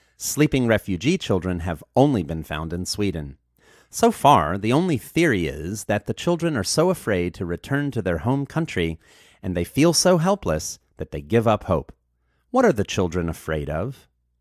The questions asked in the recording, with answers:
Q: What are the children afraid of?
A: The children are afraid of returning to their home country.